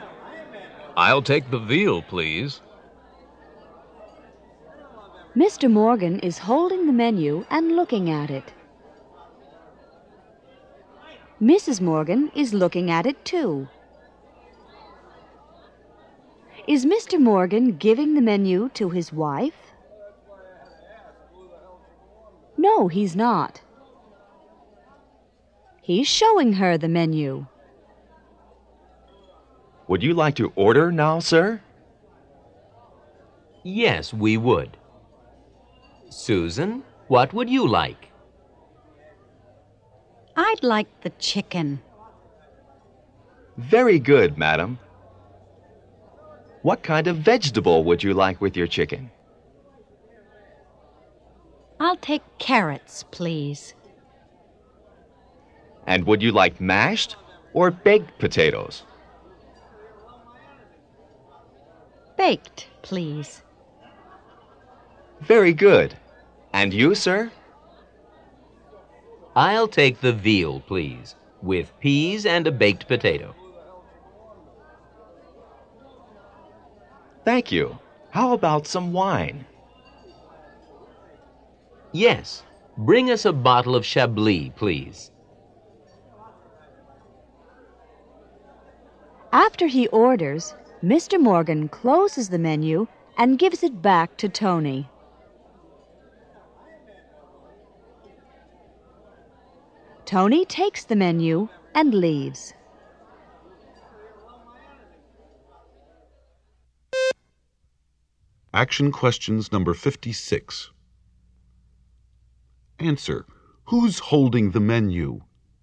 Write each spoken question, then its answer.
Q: Who's holding the menu?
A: Mr. Morgan is.